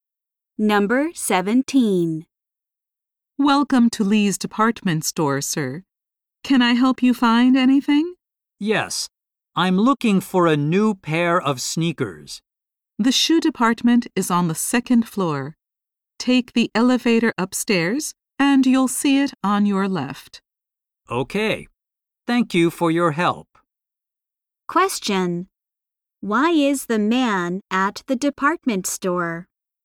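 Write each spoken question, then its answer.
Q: Why is the man at the department store?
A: To buy a new pair of sneakers.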